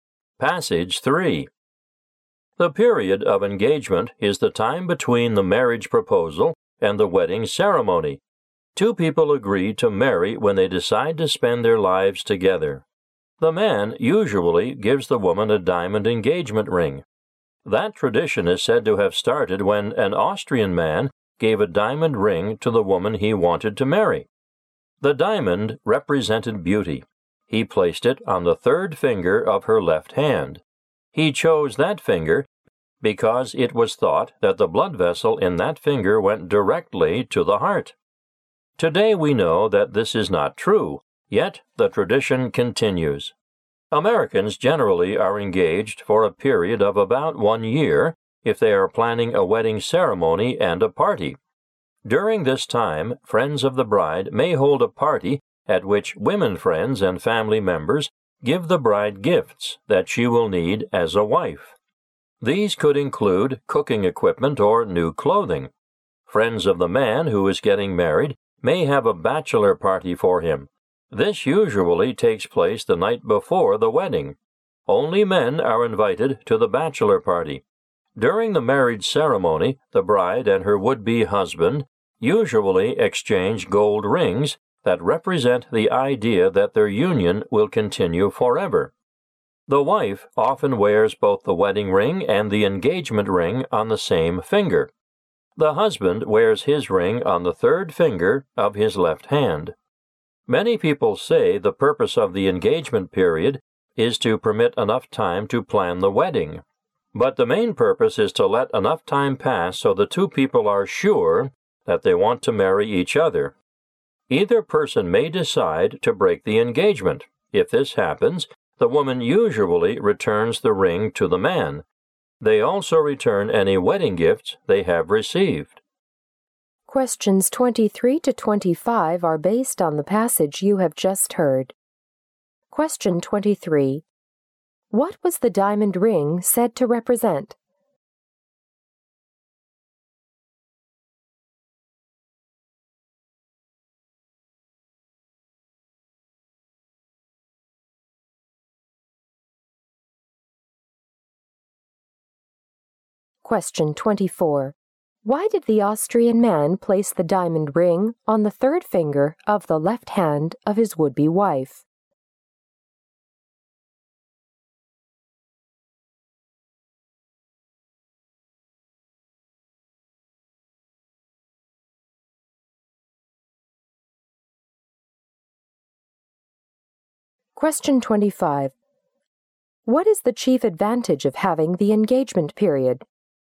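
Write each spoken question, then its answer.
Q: What was the diamond ring said to represent?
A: Beauty.

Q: Why did the Austrian man place the diamond ring on the third finger of the left hand of his would-be wife?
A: Its blood vessel was thought to go directly to the heart.

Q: What is the chief advantage of having the engagement period?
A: It gives time for the two to be sure they want to marry.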